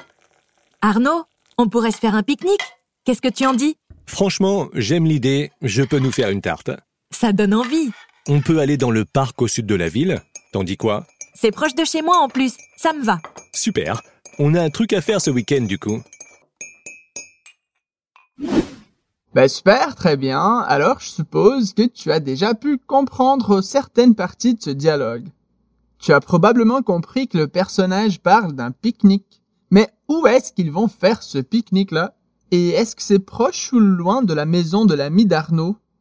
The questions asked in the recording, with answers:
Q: Mais où est-ce qu'ils vont faire ce pique-nique-là?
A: On peut aller dans le parc au sud de la ville.

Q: Et est-ce que c'est proche ou loin de la maison de l'ami d'Arnaud?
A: C'est proche de chez moi en plus.